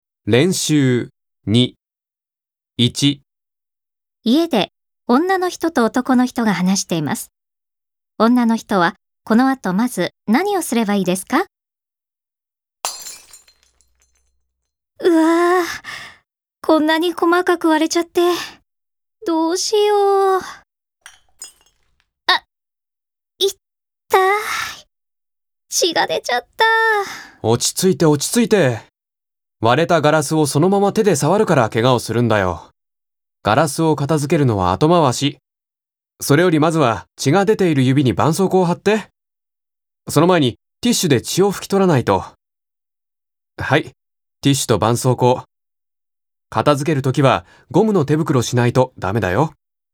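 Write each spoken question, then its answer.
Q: 女の人はこの後まず何をすればいいですか?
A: ティッシュで指の血を拭き取る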